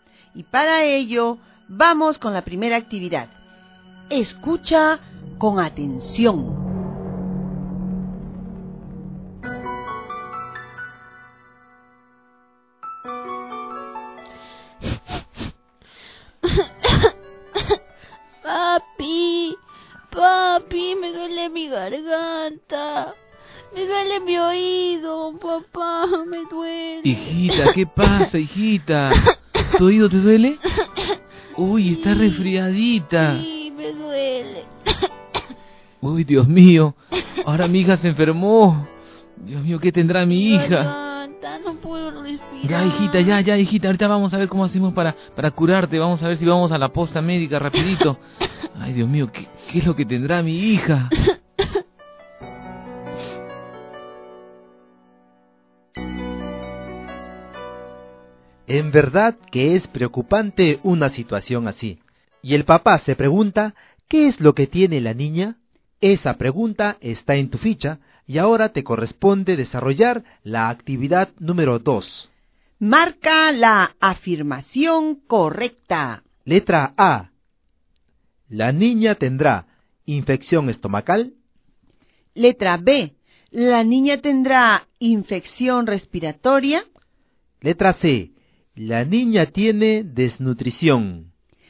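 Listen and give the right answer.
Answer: B: La niña tendrá infección respiratoria.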